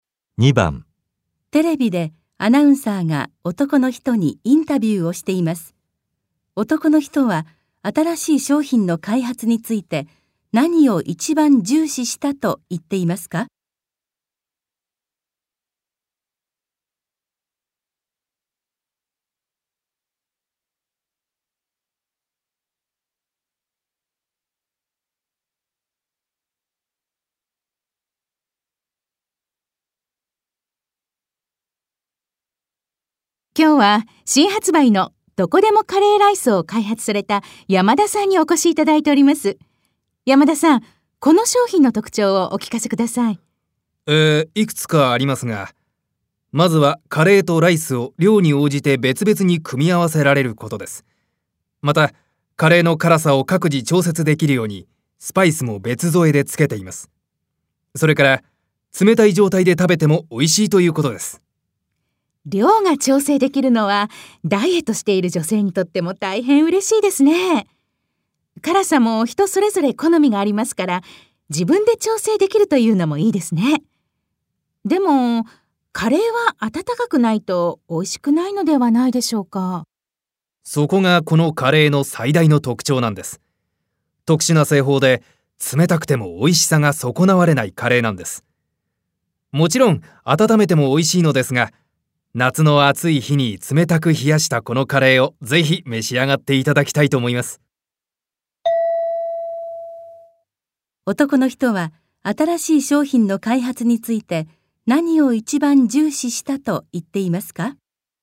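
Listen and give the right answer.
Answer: 冷たくても美味しく食べられること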